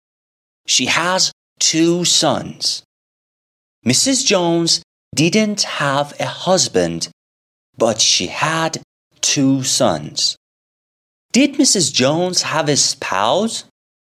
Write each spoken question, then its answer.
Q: Did Mrs. Jones have a spouse?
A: No. She didn't have a spouse.